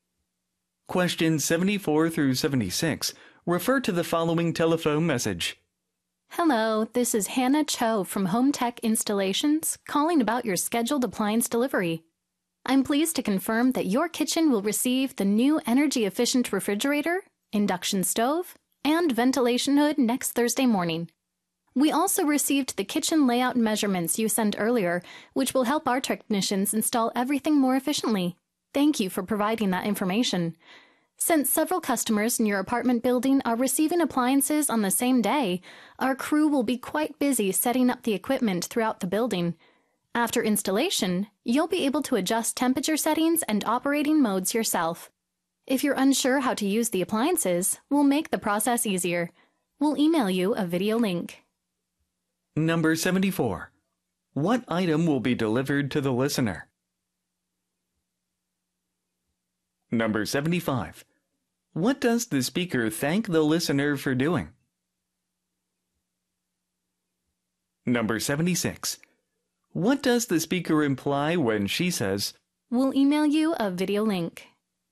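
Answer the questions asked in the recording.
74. Kitchen appliances (refrigerator, stove, ventilation hood)
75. Sending kitchen layout measurements
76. Instructions on using the appliances will be provided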